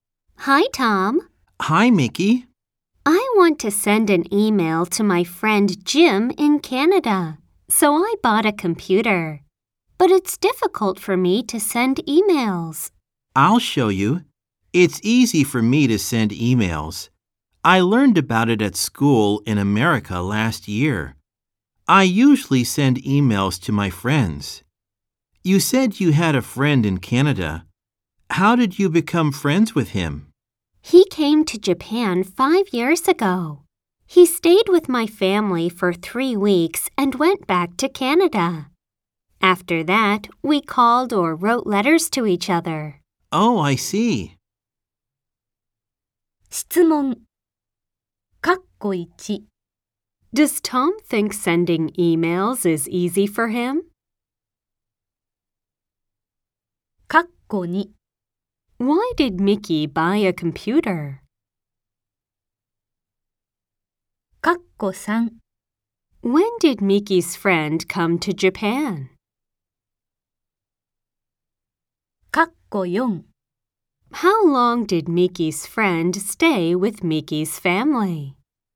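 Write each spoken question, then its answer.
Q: Does Tom think sending emails is easy for him?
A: Yes, he does.

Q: Why did Mickey buy a computer?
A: To send an email to her friend Jim in Canada.

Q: When did Mickey's friend come to Japan?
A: Five years ago.

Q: How long did Mickey's friend stay with Mickey's family?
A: For three weeks.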